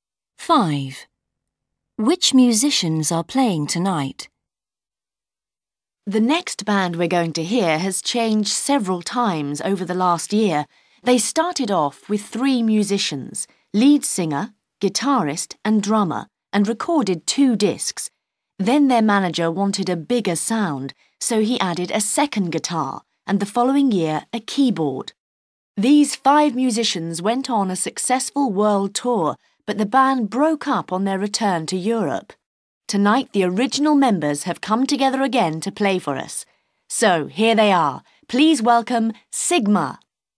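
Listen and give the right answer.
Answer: the original three: lead singer, guitarist and drummer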